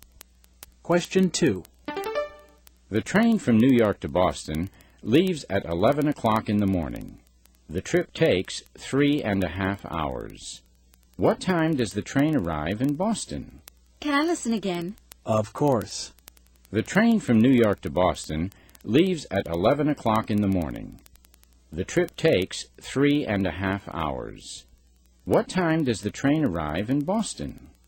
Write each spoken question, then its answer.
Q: What time does the train arrive in Boston?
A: It arrives at 2:30.